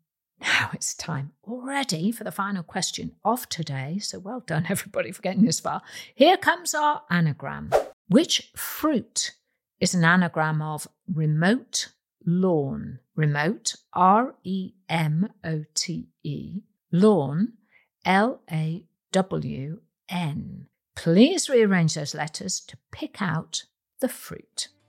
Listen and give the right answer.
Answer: The answer is the watermelon, W-A-T-E-R-M-E-L-O-N.